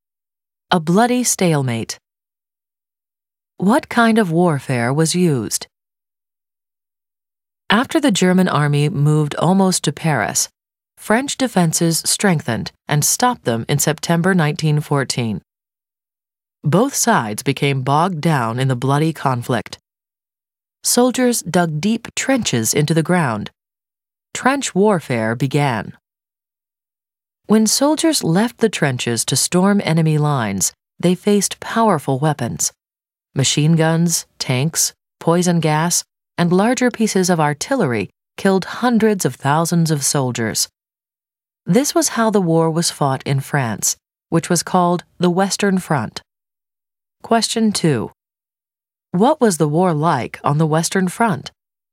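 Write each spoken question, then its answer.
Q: What was the war like on the Western Front?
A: Bloody stalemate of trench warfare; soldiers storming enemy lines were killed by machine guns, tanks, poison gas and artillery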